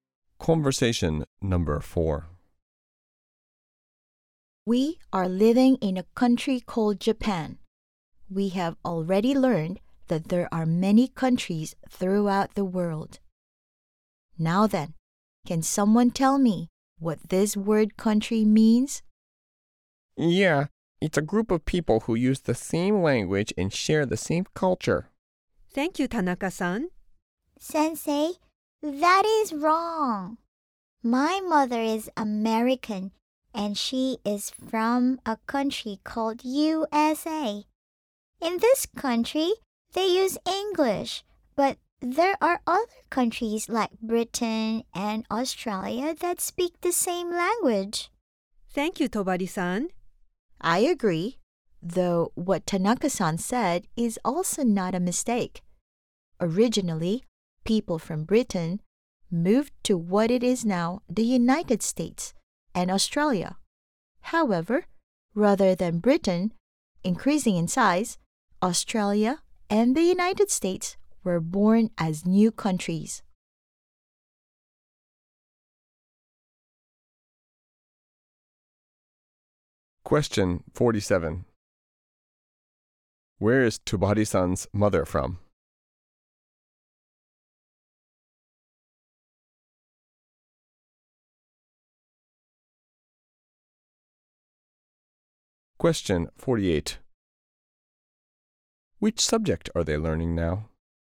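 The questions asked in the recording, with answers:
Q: Where is Tobari-san's mother from?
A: The USA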